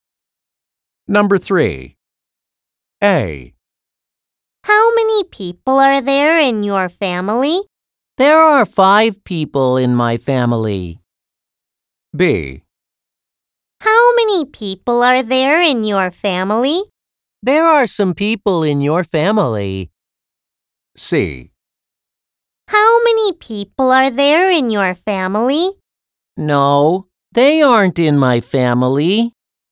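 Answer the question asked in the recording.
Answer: A: There are 5 people in my family.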